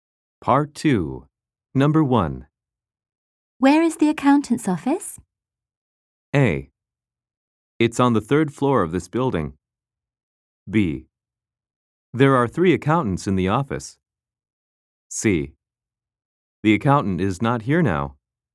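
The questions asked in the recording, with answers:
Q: Where is the accountant's office?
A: A: It's on the third floor of this building.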